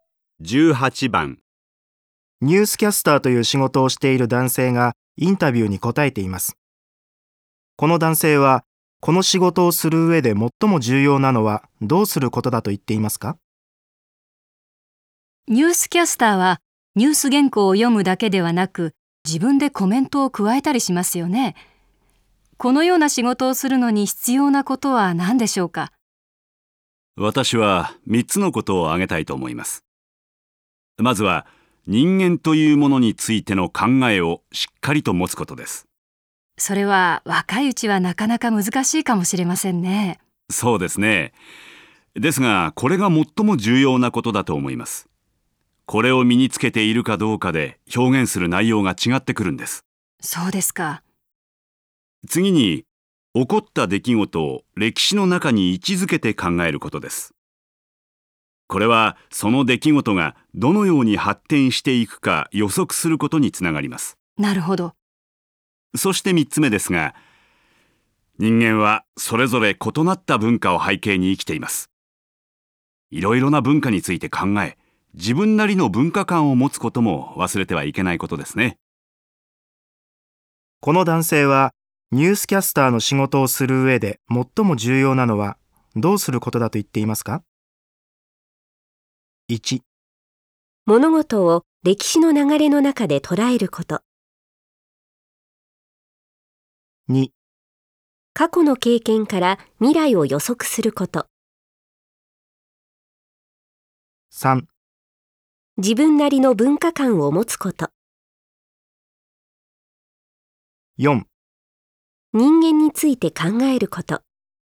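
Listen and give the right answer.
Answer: 4: 人間について考えること。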